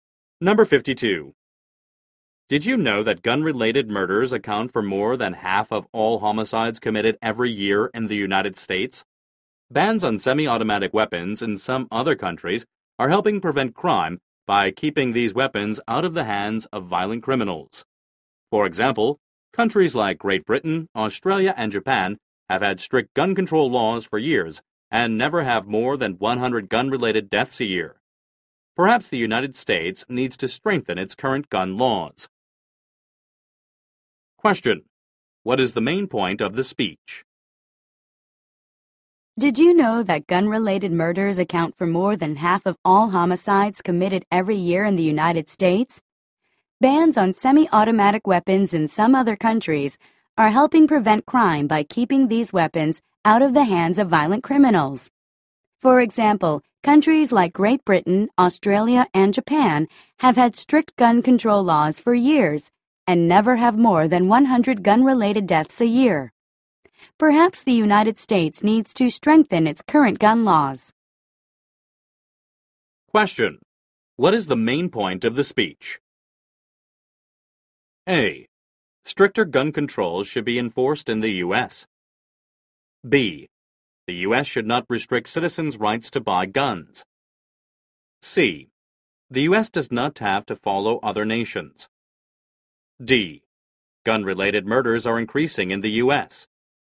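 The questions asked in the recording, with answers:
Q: What is the main point of the speech?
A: A: Stricter gun controls should be enforced in the U.S.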